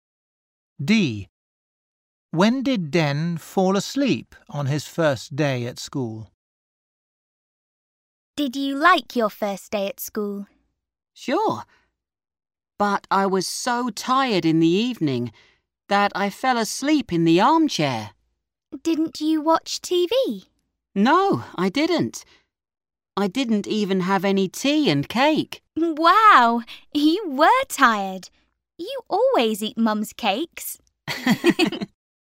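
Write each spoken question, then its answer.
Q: When did Den fall asleep on his first day at school?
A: In the evening, in the armchair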